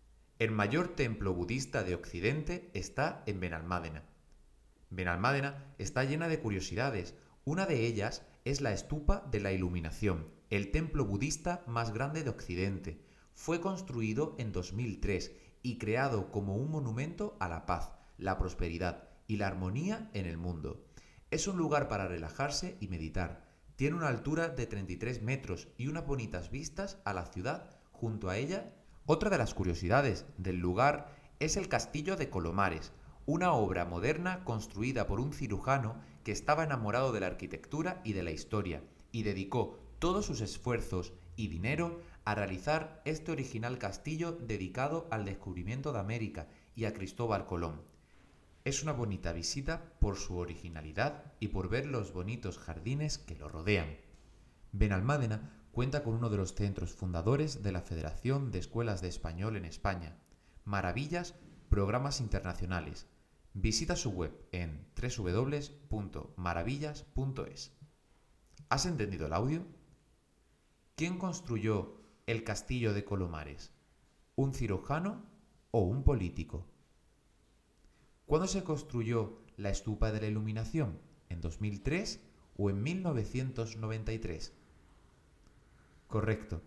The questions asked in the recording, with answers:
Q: ¿Quién construyó el castillo de Colomares?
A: El castillo de Colomares lo construyó un cirujano

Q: ¿Cuándo se construyó la estupa de la iluminación?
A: la estupa de la iluminación se construyó en el 2003.